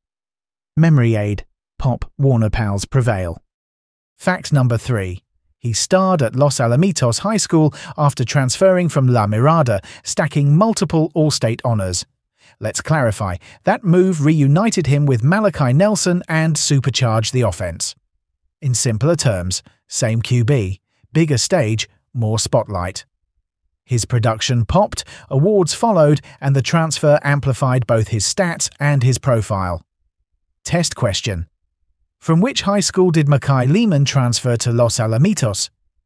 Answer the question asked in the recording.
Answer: Correct answer. La Mirada.